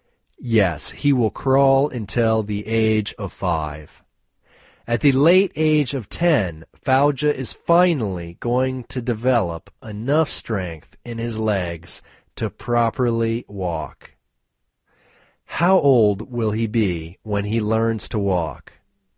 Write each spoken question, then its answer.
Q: How old will he be when he learns to walk?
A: He will be 10 when he learns to walk.